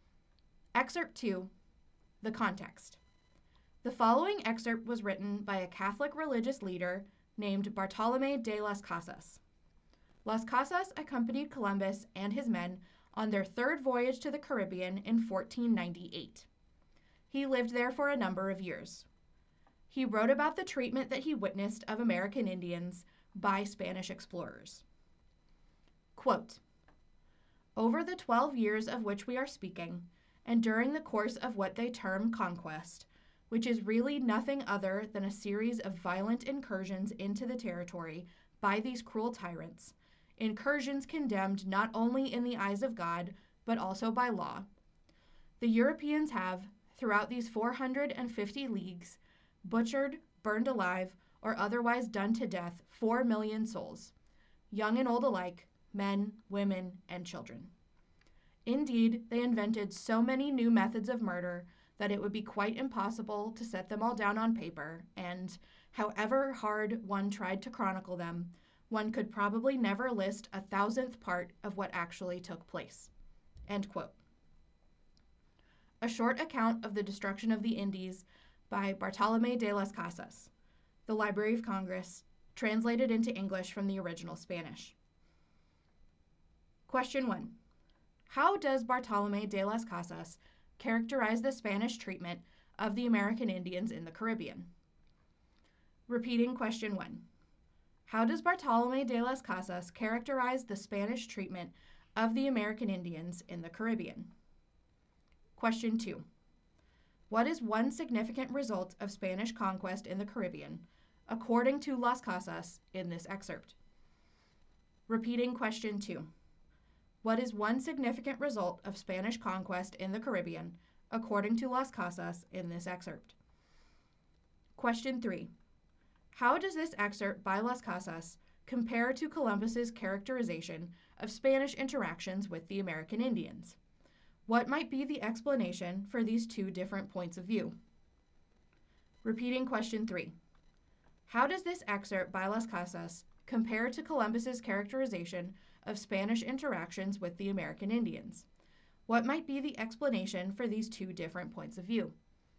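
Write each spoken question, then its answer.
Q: How does Bartolomé de las Casas characterize the Spanish treatment of the American Indians in the Caribbean?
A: As extremely cruel and violent: the conquest was a series of violent incursions by cruel tyrants, condemned by God and by law.

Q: What is one significant result of Spanish conquest in the Caribbean, according to Las Casas, in this excerpt?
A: About 4 million American Indians (young and old, men, women and children) were killed.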